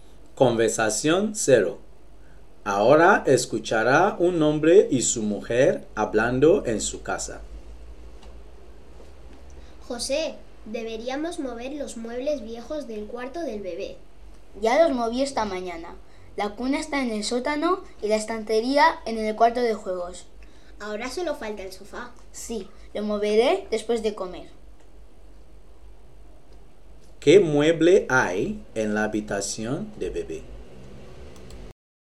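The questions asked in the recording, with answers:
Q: ¿Qué mueble hay en la habitación de bebé?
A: El sofá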